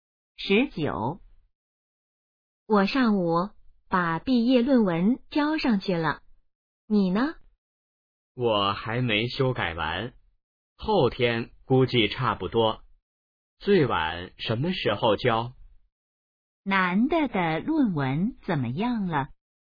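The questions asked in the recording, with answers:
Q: 男的的论文怎么样了?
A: 还没修改完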